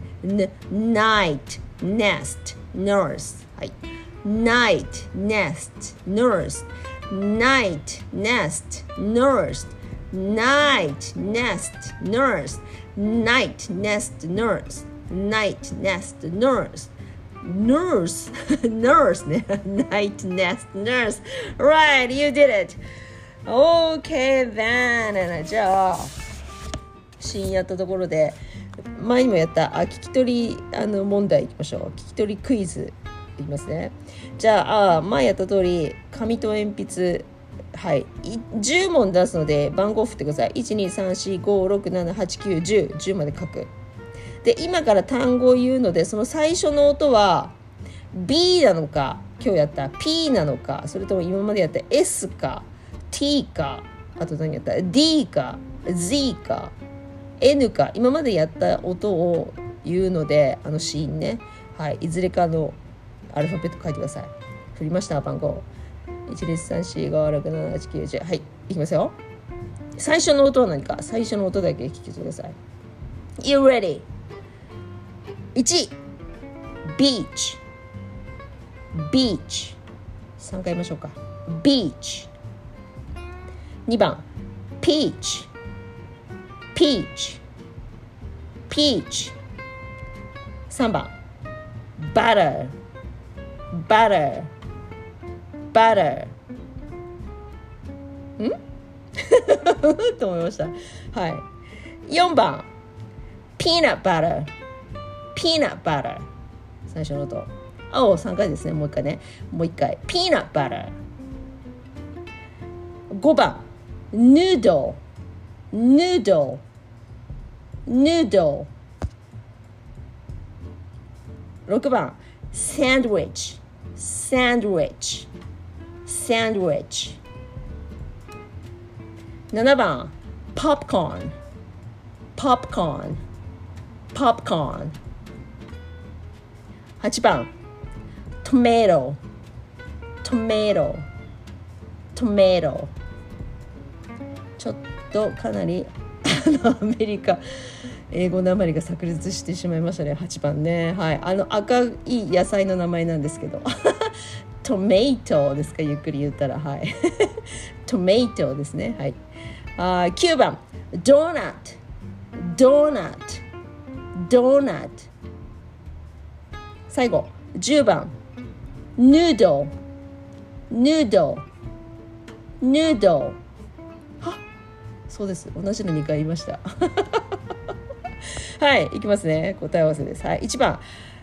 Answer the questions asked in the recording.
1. B の音ブ。
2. だから P の音
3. バターブですね
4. だからピーの音
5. N の音
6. サンドウィッチ S です
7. これは P の音
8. これは T の音
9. D の音
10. N の音